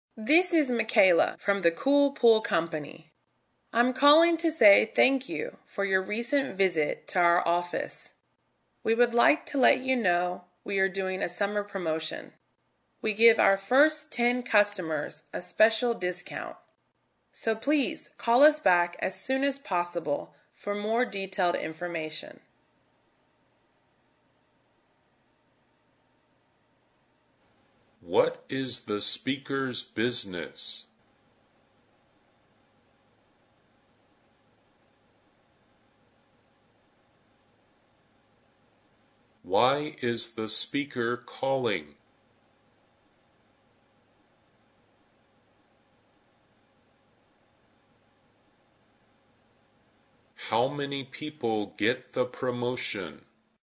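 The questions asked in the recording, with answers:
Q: What is the speaker's business?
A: A pool company (the Cool Pool Company)

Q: How many people get the promotion?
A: The first 10 customers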